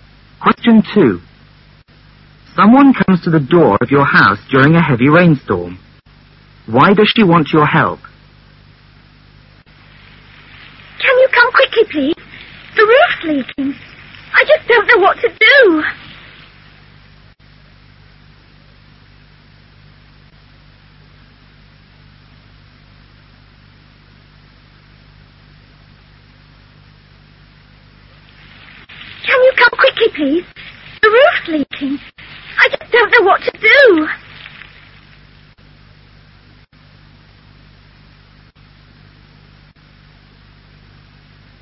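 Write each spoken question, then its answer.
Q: Why does she want your help?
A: Her roof is leaking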